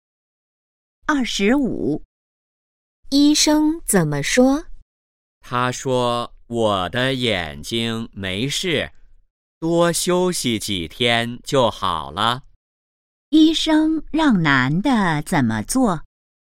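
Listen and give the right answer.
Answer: 多休息几天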